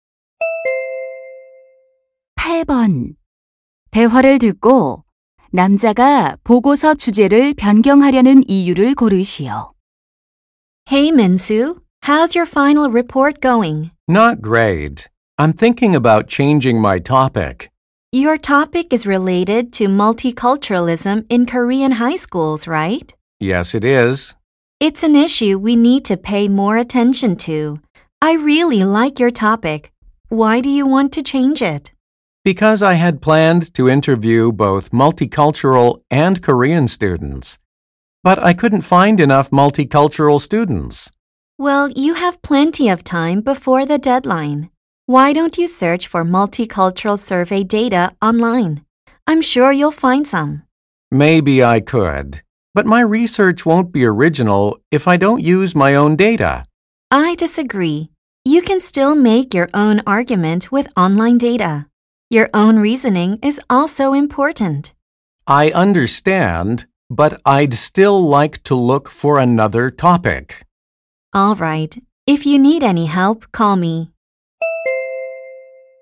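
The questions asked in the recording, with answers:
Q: 대화를 듣고 남자가 보고서 주제를 변경하려는 이유를 고르시오.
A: 인터뷰할 다문화 학생을 충분히 찾지 못해서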